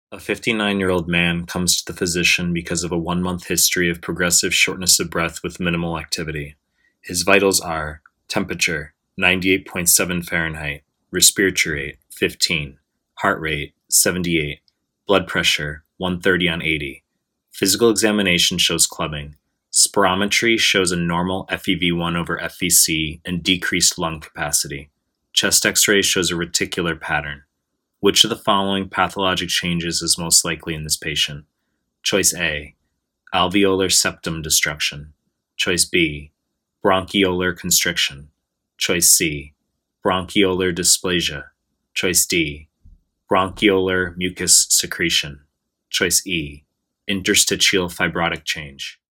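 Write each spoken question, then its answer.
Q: Which of the following pathologic changes is most likely in this patient?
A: E: interstitial fibrotic change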